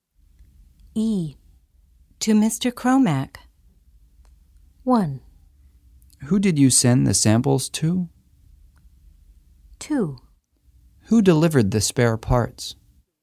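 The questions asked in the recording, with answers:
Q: To Mr. Cromack.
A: 1: Who did you send the samples to?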